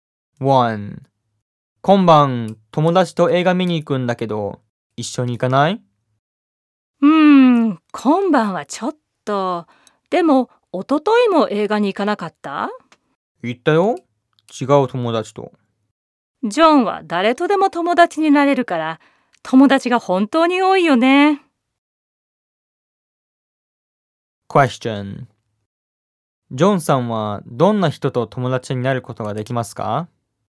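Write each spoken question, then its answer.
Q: ジョンさんはどんな人と友達になることができますか?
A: 誰とでも友達になれます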